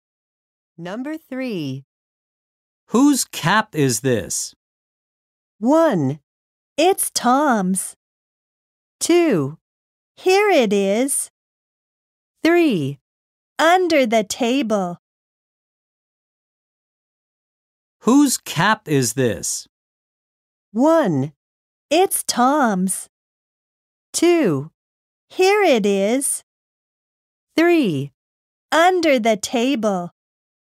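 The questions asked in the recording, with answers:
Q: Whose cap is this?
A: 1: It's Tom's.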